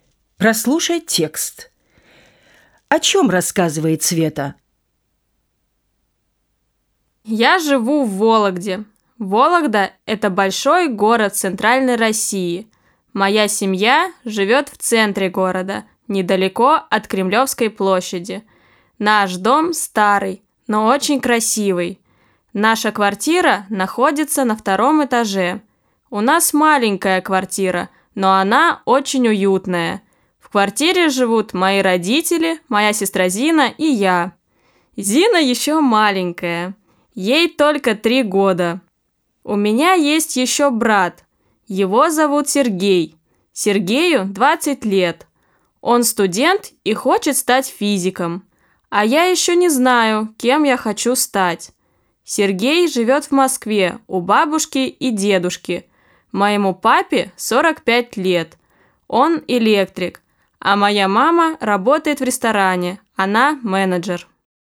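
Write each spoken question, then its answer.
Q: О чем рассказывает Света?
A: О своём городе, доме и семье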